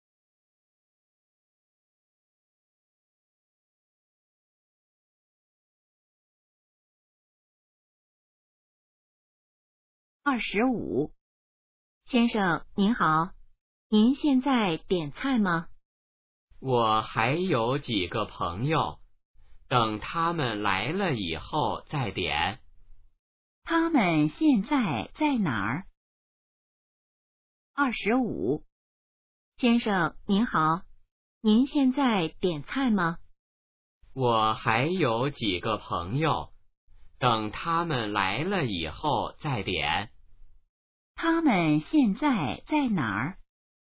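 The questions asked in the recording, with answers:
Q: 他们现在在哪儿?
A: 饭馆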